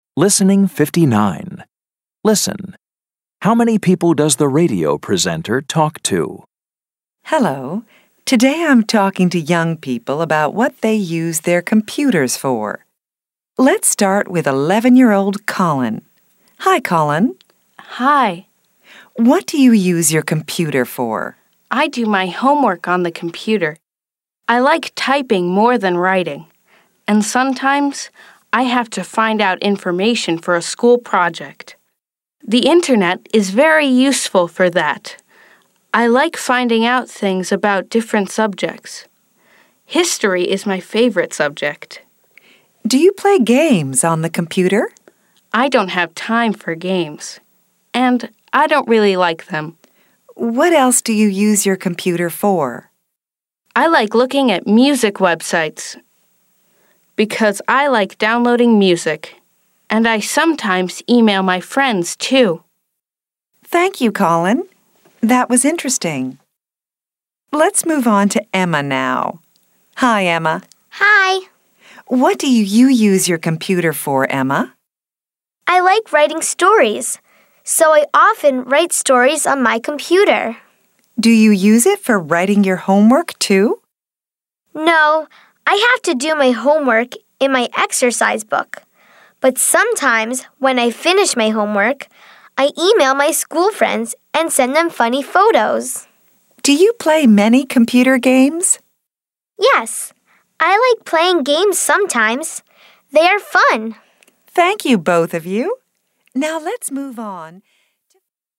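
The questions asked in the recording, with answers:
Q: How many people does the radio presenter talk to?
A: Two (Colin and Emma)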